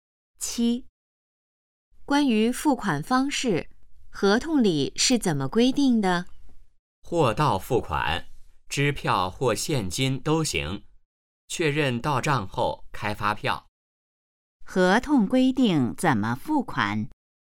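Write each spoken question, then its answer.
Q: 合同规定怎么付款?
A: 货到付款,支票或现金都行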